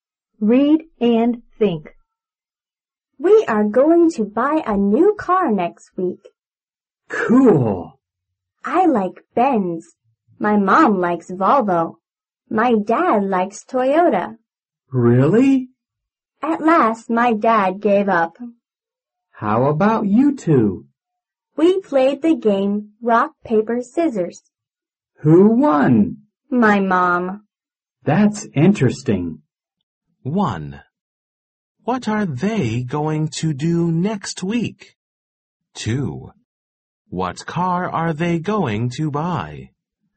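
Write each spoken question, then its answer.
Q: What are they going to do next week?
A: They are going to buy a new car.

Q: What car are they going to buy?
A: A Volvo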